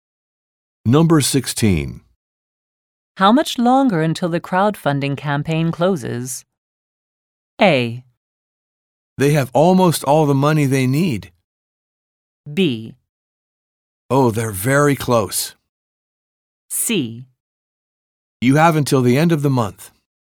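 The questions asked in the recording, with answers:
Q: How much longer until the crowdfunding campaign closes?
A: C: You have until the end of the month.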